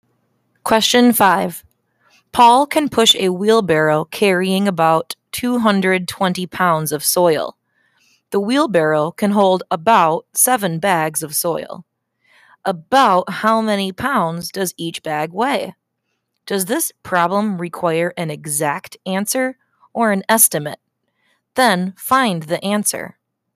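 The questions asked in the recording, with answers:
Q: About how many pounds does each bag weigh?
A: About 30 pounds (an estimate: 220 ÷ 7 ≈ 30)

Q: Does this problem require an exact answer or an estimate? Then find the answer.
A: An estimate; about 30 pounds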